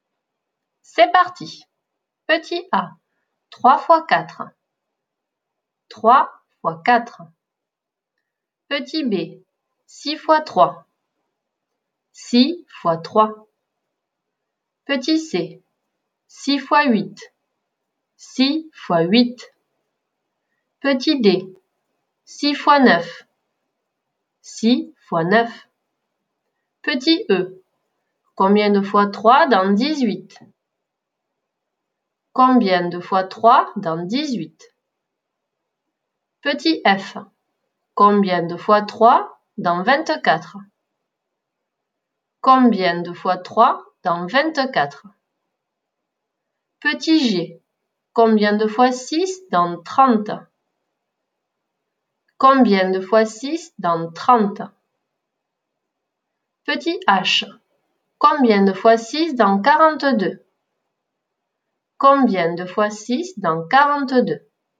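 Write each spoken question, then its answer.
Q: 3 fois 4.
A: 12

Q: 6 fois 3.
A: 18

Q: 6 fois 8.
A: 48

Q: 6 fois 9.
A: 54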